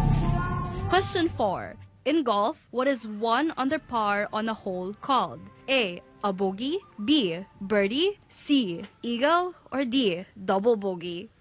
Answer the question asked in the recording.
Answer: That's a birdie.